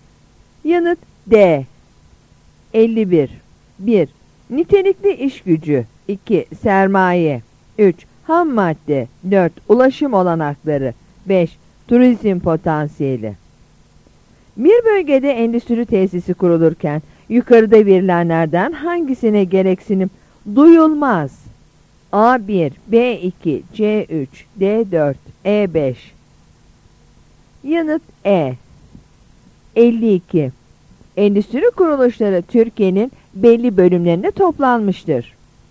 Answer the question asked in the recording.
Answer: Yanıt E.